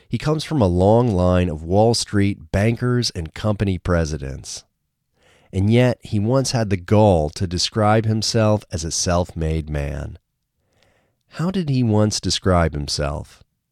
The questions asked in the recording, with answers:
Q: How did he once describe himself?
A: He once described himself as a self-made man.